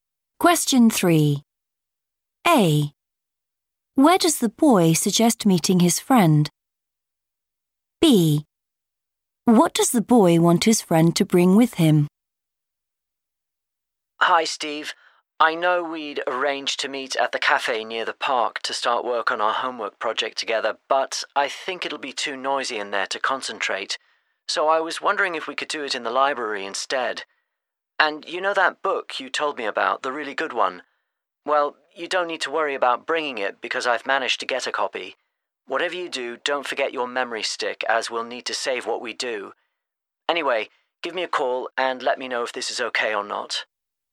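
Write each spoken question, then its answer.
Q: Where does the boy suggest meeting his friend?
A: the library

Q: What does the boy want his friend to bring with him?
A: memory stick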